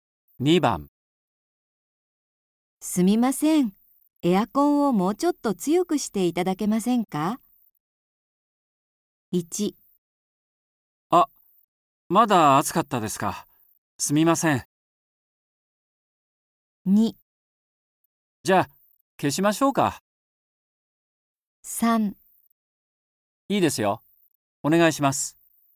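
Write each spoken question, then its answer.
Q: すみません、エアコンをもうちょっと強くしていただけませんか?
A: 1: あ、まだ暑かったですか。すみません。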